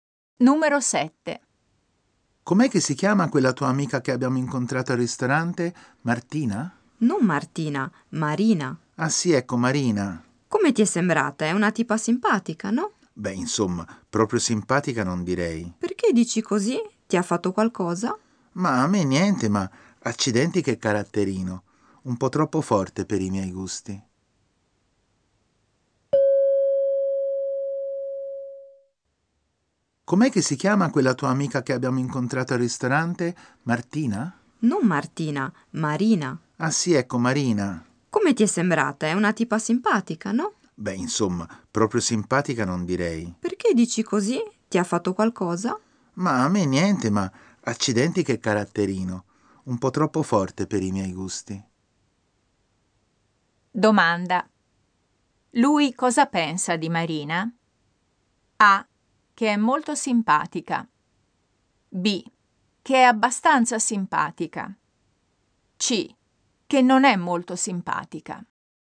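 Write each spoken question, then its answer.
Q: Lui cosa pensa di Marina?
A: C: Che non è molto simpatica.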